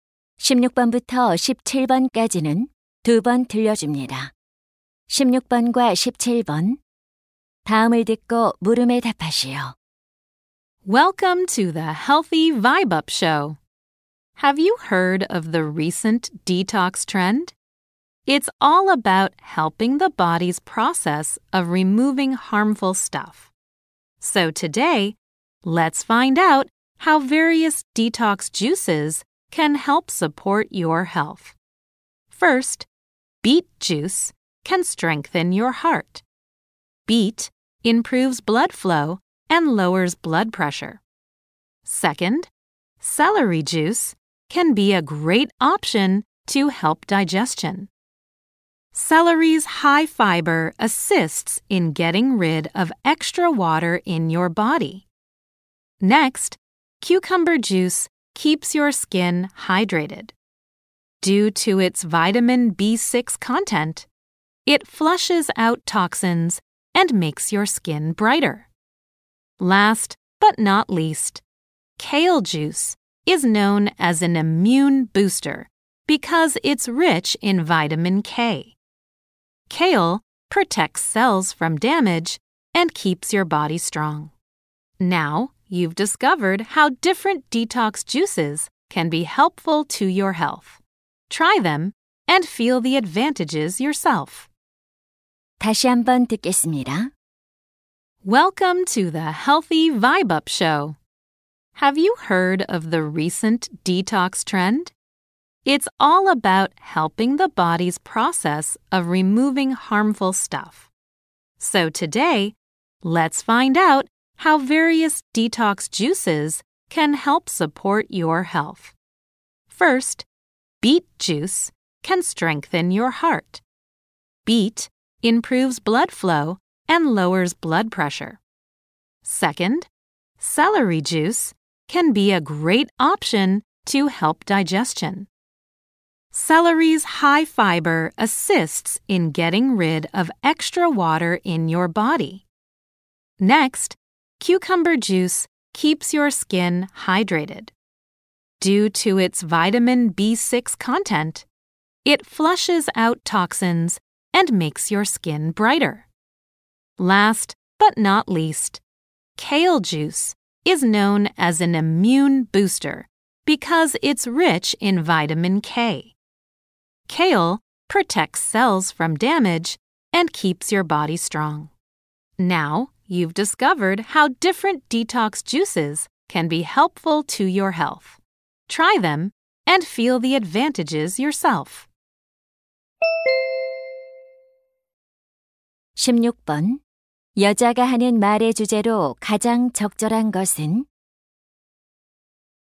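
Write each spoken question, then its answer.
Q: 여자가 하는 말의 주제로 가장 적절한 것은?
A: 여러 디톡스 주스가 건강에 주는 이점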